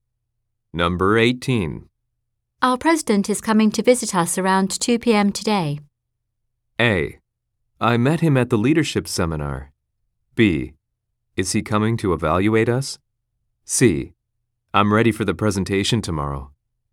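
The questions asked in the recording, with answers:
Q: Our president is coming to visit us around 2 p.m.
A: B: Is he coming to evaluate us?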